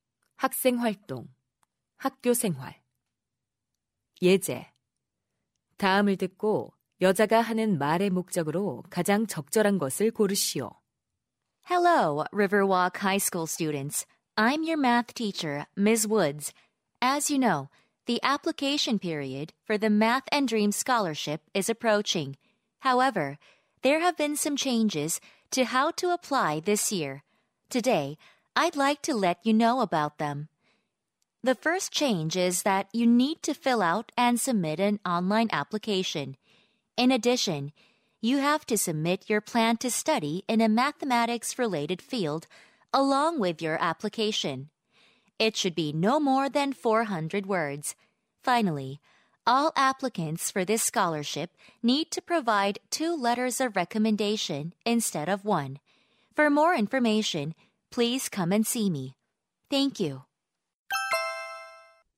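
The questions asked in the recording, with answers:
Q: 다음을 듣고 여자가 하는 말의 목적으로 가장 적절한 것을 고르시오.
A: 수학 장학금 신청 방법의 변경 사항을 안내하려고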